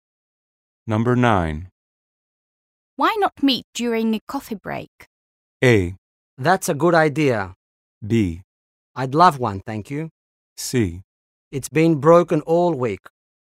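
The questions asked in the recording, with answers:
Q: Why not meet during a coffee break?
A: A: That's a good idea.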